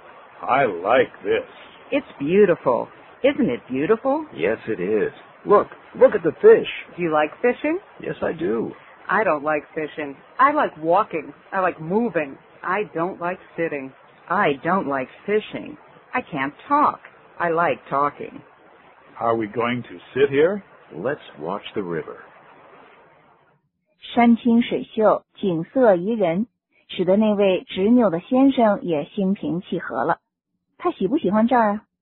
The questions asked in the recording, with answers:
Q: 他喜不喜欢这儿啊?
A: 他喜欢,他尤其喜欢河里的鱼。